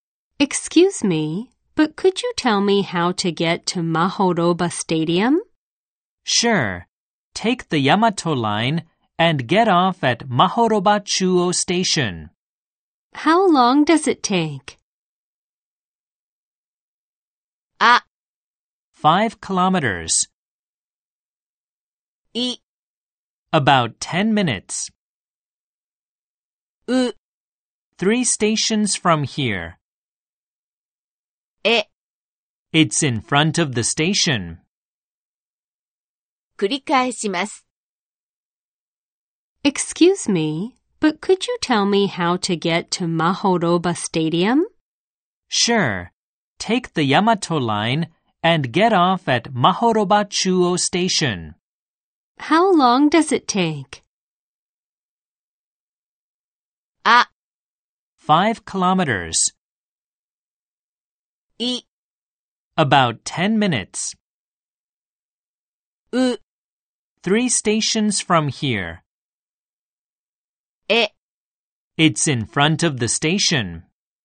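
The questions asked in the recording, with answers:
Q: How long does it take?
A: い: About 10 minutes.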